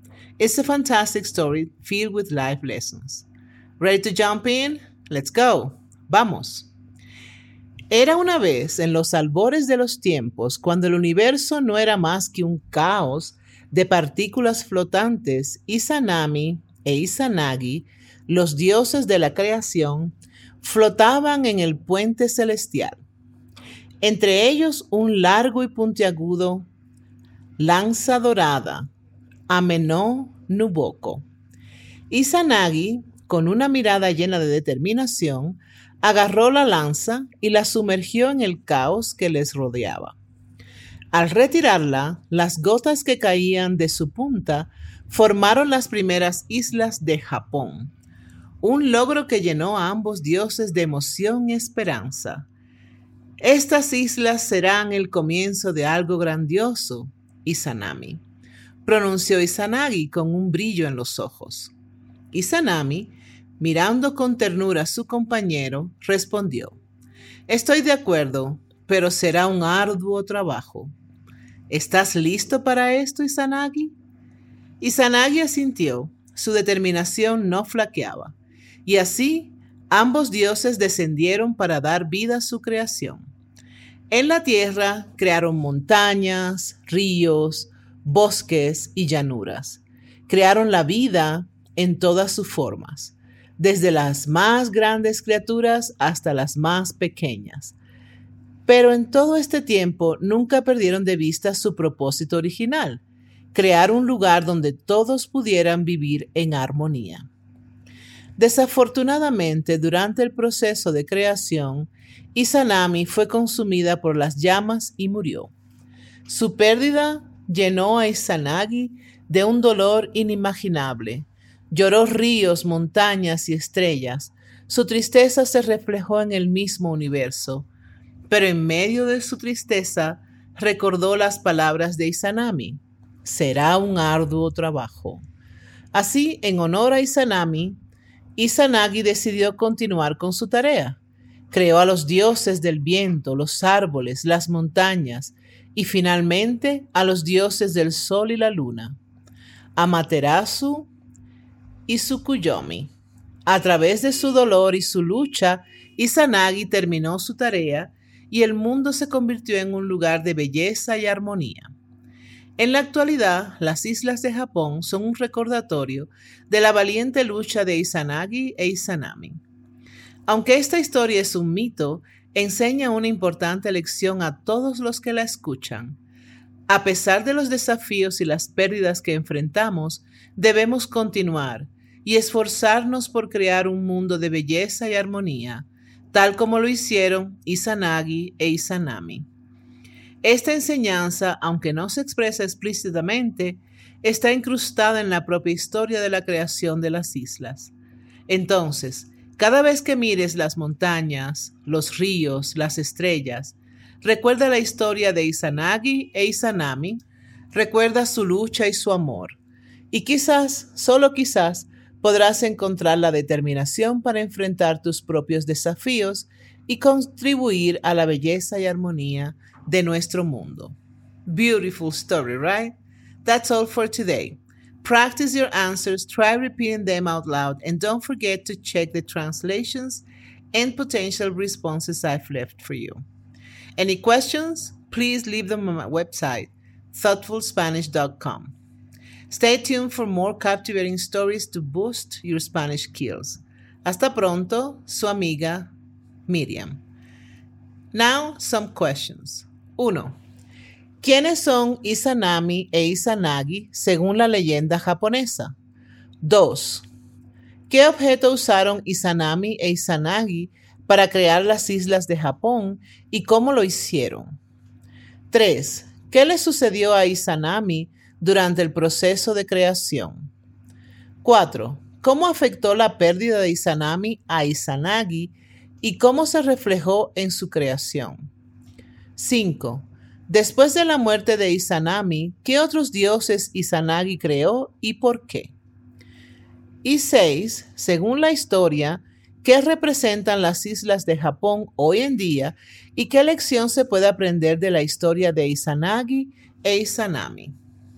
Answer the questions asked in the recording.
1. Izanami e Izanagi son los dioses de la creación en la mitología japonesa.
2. Izanami e Izanagi usaron una lanza dorada llamada Ameno para crear las islas de Japón. Lo hicieron sumergiendo la lanza en el caos y las gotas que caían de la lanza formaron las islas.
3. Eh, durante el proceso de creación, Izanami fue consumida por las llamas y murió.
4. La pérdida de Izanami llenó a Izanagi de un dolor inmenso Lloró tanto que sus lágrimas crearon ríos, montañas y estrellas.
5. Izanagi creó a los dioses del viento, los árboles, las montañas y finalmente a los dioses del sol y la luna, Amaterasu y Tsukuyomi, para continuar la tarea de creación en honor a Izanami.
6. Según la historia, las islas de Japón son un recordatorio del esfuerzo y la lucha de Izanagi e Izanami. La lección que se puede aprender es que, a pesar de los desafíos y las pérdidas, debemos continuar esforzándonos por crear un mundo de belleza y armonía.